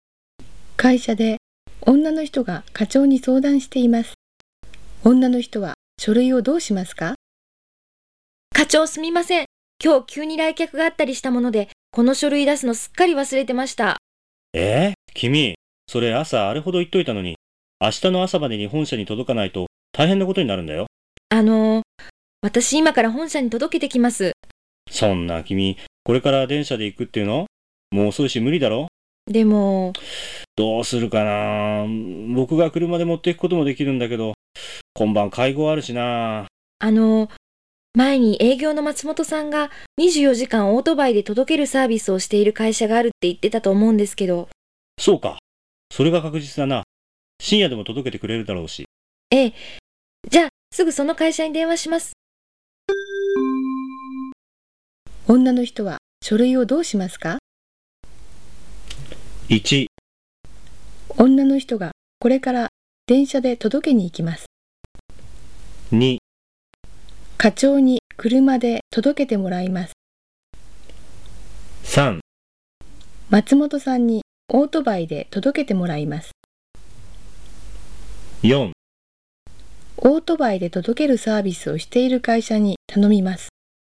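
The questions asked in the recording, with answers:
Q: 女の人は書類をどうしますか?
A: 4: オートバイで届けるサービスをしている会社に頼みます。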